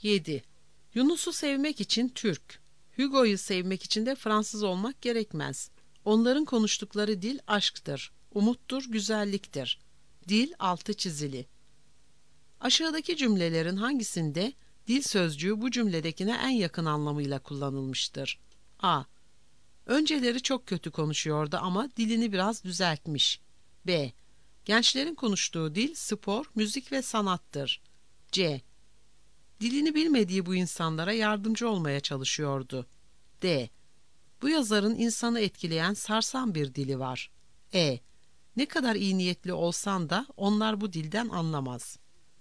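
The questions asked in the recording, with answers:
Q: Aşağıdaki cümlelerin hangisinde dil sözcüğü bu cümledekine en yakın anlamıyla kullanılmıştır?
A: B: Gençlerin konuştuğu dil spor, müzik ve sanattır.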